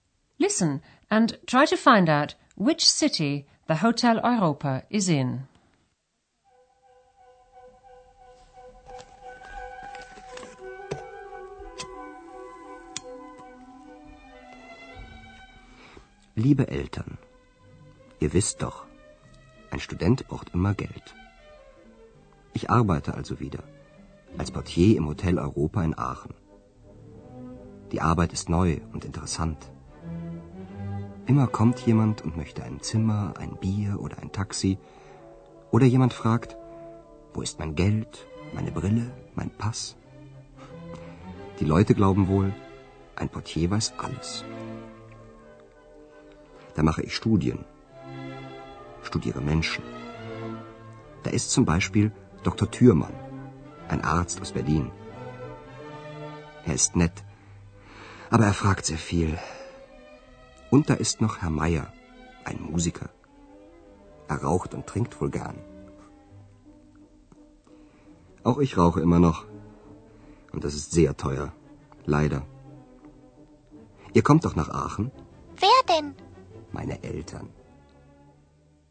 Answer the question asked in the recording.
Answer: The Hotel Europa is in Aachen, a lovely old city on the German border with Belgium and not far from Holland.